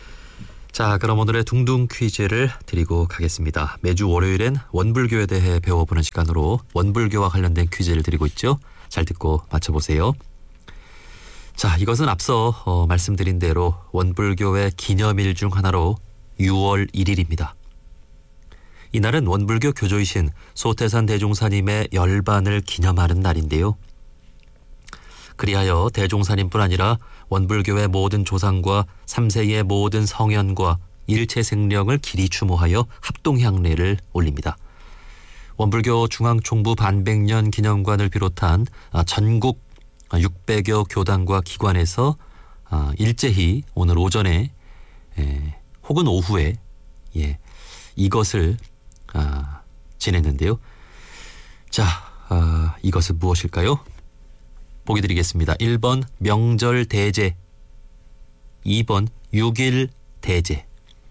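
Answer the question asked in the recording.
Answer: 2번: 6일 대제 (육일대재)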